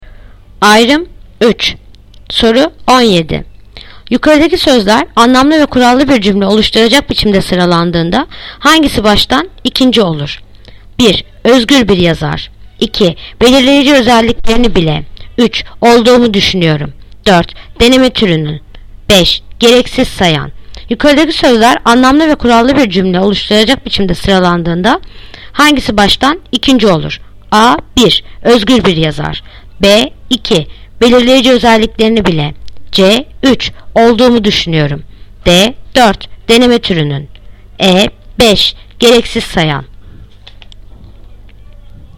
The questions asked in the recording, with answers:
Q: Yukarıdaki sözler anlamlı ve kurallı bir cümle oluşturacak biçimde sıralandığında hangisi baştan ikinci olur?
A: Yanıt Bursa. 2. Belirleyici özelliklerini bile.